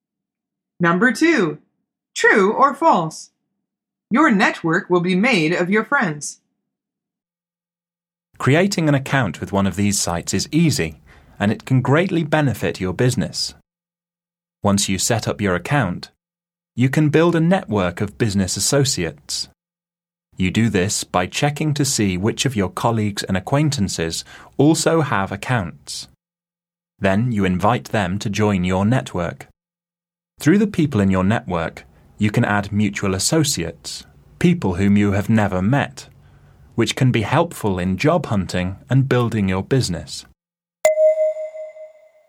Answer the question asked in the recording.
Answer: The answer is false.